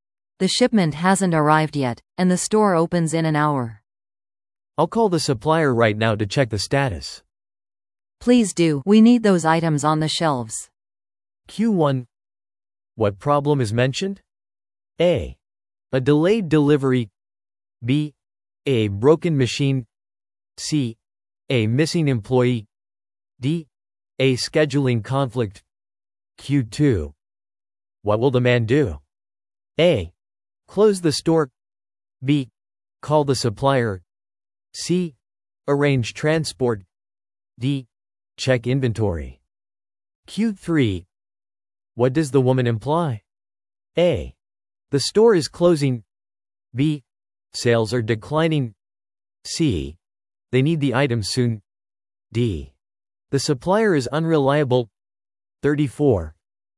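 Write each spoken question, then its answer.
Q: What problem is mentioned?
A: A: A delayed delivery.

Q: What will the man do?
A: B: Call the supplier.

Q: What does the woman imply?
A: C: They need the items soon.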